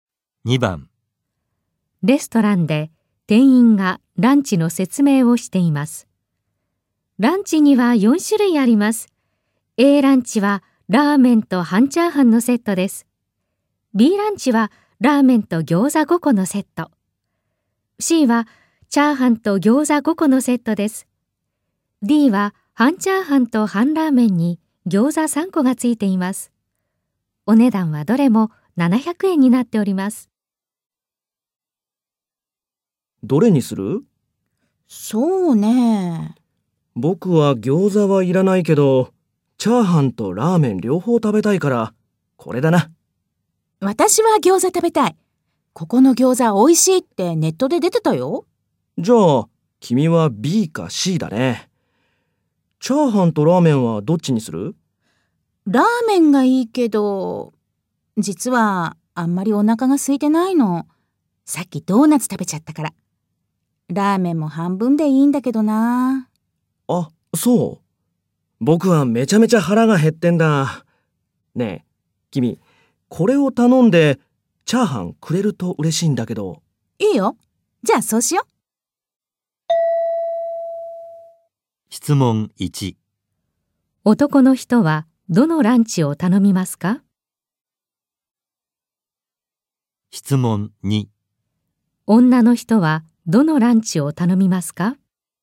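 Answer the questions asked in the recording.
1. Aランチ(ラーメンと半チャーハンのセット)
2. Dランチ(半チャーハンと半ラーメンに餃子3個)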